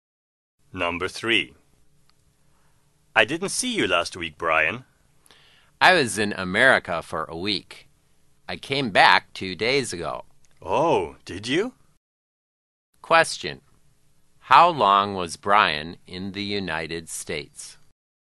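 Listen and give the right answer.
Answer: For a week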